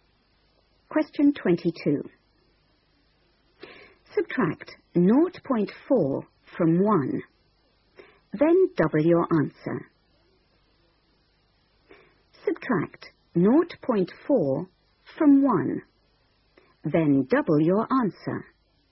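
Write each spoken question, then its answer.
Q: Subtract 0.4 from 1, then double your answer.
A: 1.2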